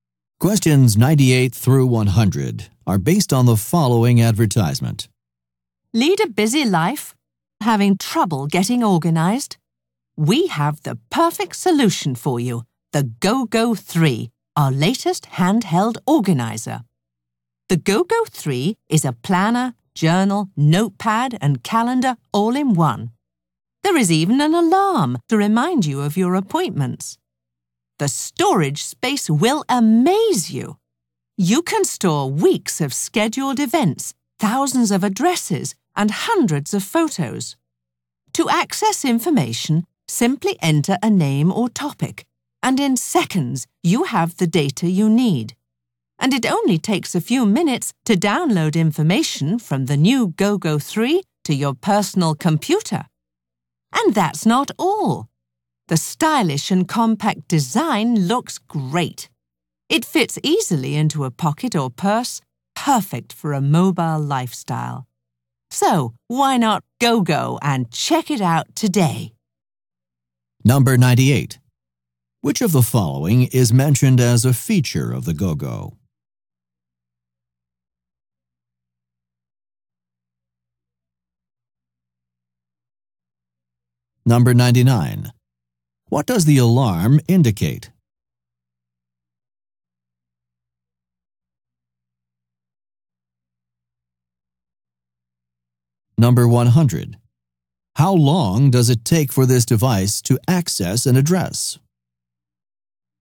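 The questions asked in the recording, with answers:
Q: What does the alarm indicate?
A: Appointments

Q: How long does it take for this device to access an address?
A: Seconds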